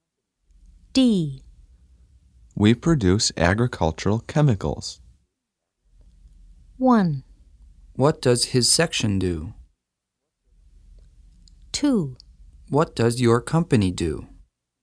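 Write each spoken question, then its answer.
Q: We produce agricultural chemicals.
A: 2: What does your company do?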